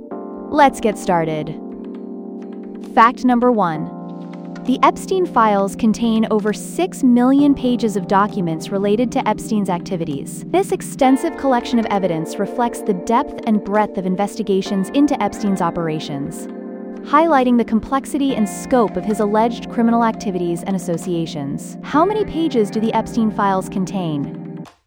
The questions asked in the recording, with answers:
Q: How many pages do the Epstein files contain?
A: Correct answer. Over 6 million pages.